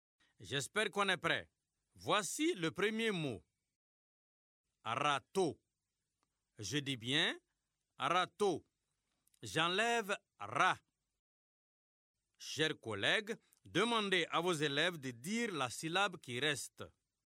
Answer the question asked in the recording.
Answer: Il reste tôt.